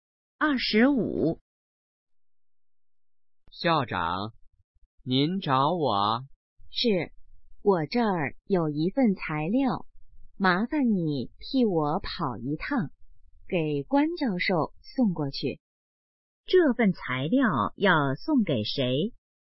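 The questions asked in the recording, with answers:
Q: 这份材料要送给谁?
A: 关教授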